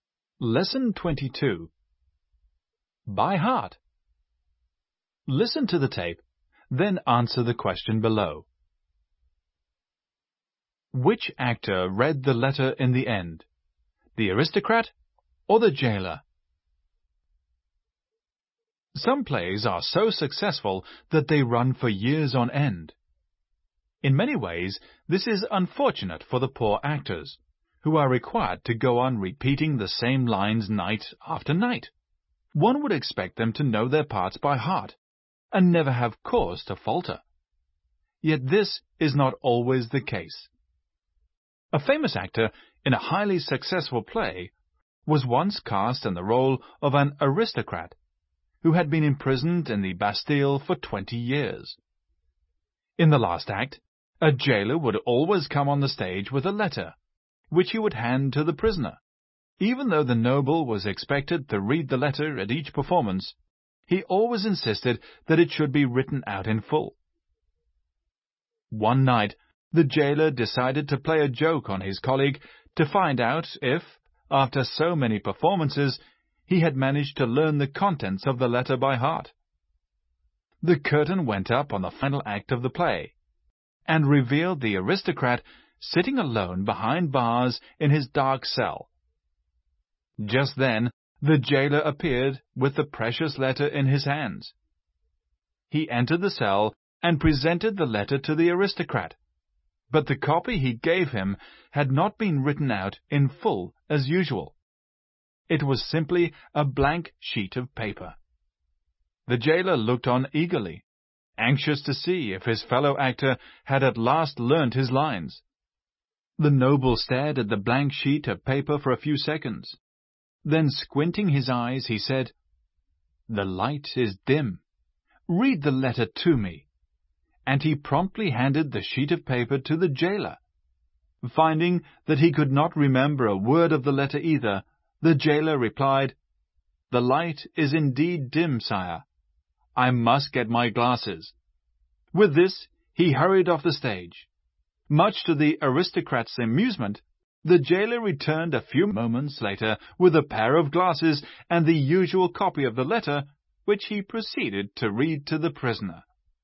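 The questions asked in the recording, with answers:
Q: Which actor read the letter in the end?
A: The jailer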